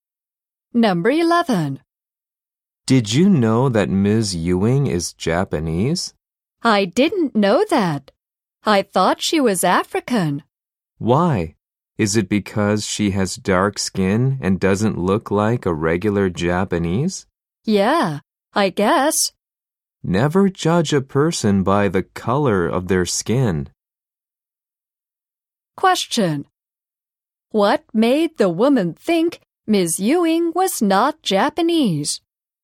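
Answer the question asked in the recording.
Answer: Her dark skin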